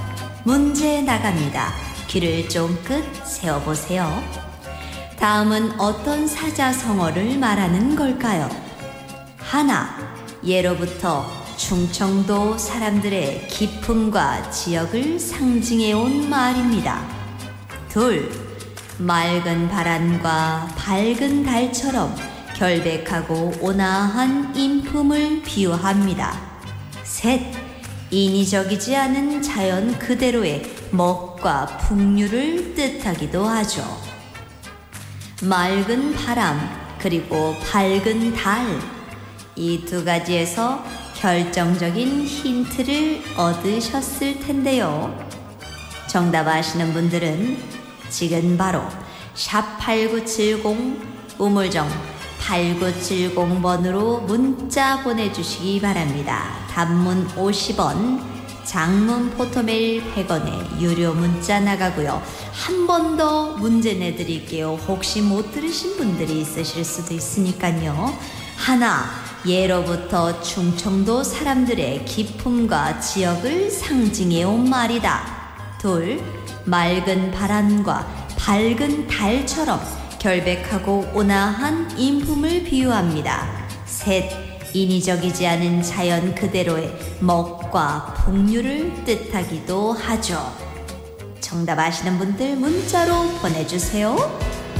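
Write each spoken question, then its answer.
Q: 다음은 어떤 사자성어를 말하는 걸까요?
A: 청풍명월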